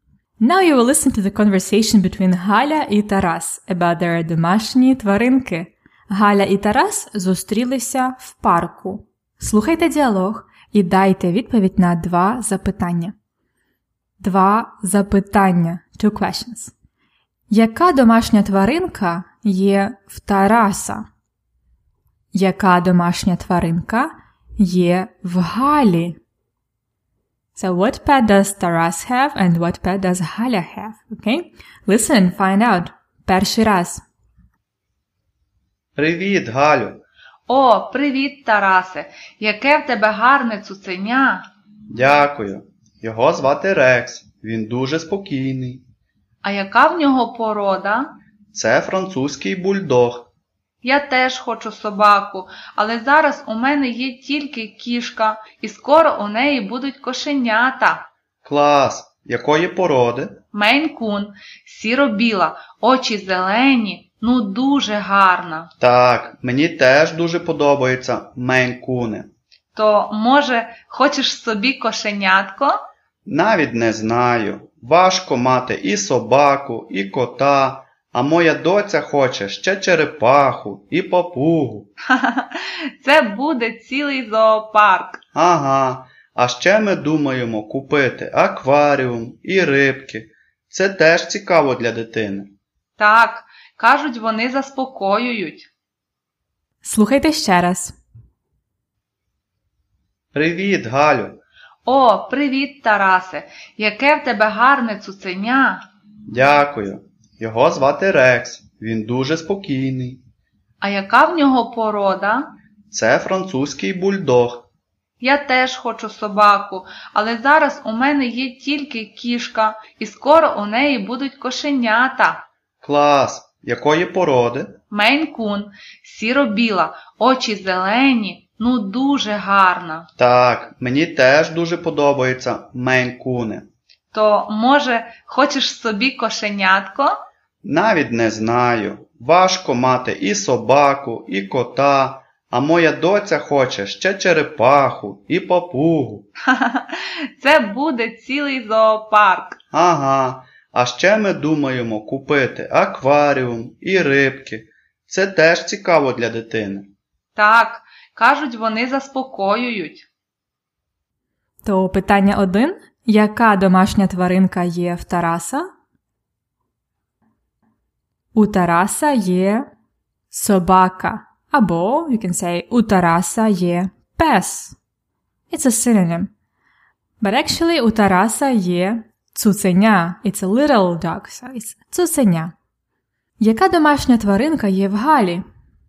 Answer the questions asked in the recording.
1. У Тараса є собака. Або you can say у Тараса є пес.
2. У Галі є кішка.